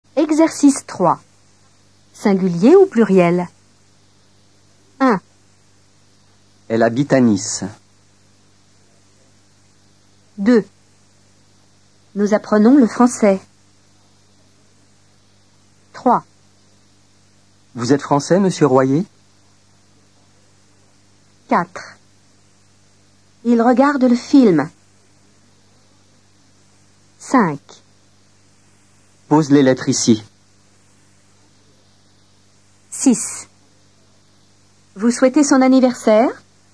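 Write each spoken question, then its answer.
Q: Nous apprenons le français.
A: pluriel

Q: Vous êtes français, monsieur Royer?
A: singulier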